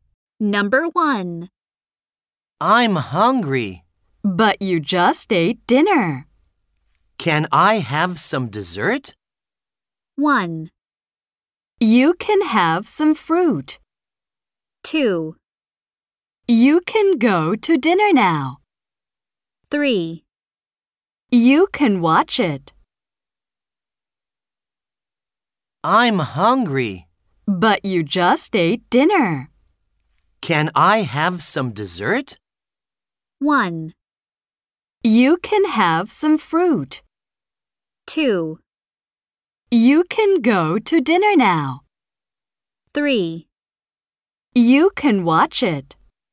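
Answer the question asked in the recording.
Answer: 1: You can have some fruit.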